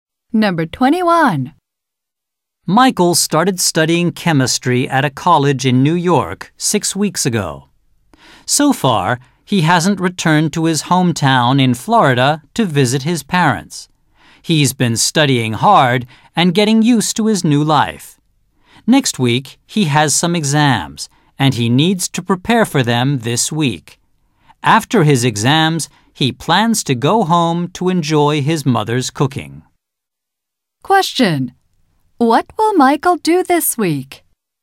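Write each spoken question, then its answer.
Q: What will Michael do this week?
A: Prepare for his exams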